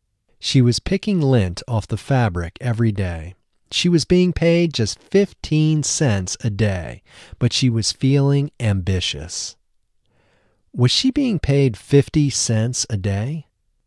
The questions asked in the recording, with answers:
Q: Was she being paid 50 cents a day?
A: No, she wasn't being paid 50 cents a day.